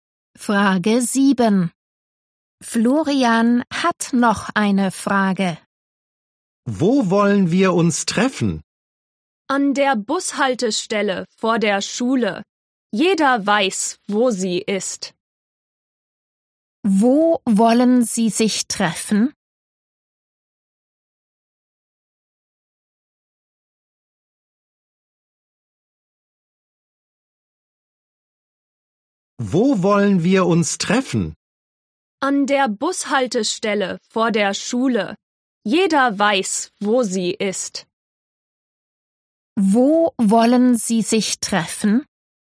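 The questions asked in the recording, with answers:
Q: Wo wollen Sie sich treffen?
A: An der Bushaltestelle vor der Schule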